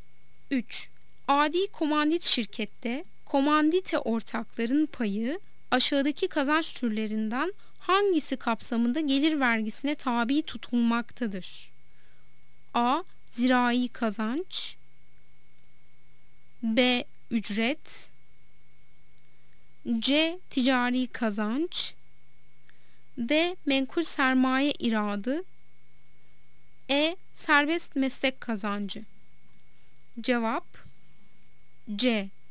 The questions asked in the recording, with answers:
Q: Adi komandit şirkette komandite ortakların payı aşağıdaki kazanç türlerinden hangisi kapsamında gelir vergisine tabi tutulmaktadır?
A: Cevap C. Ticari kazanç